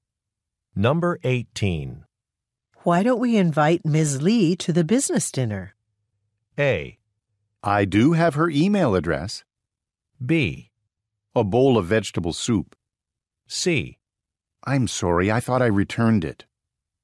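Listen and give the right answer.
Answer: A: I do have her email address.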